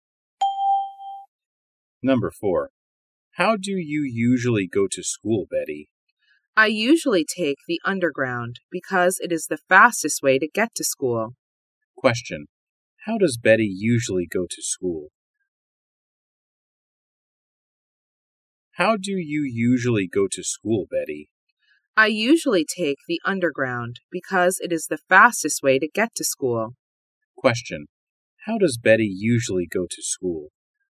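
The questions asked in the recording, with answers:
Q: How does Betty usually go to school?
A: By underground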